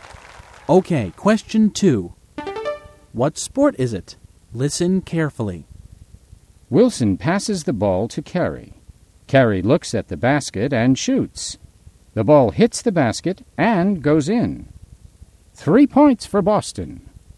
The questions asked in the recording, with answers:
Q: What sport is it?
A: It's basketball.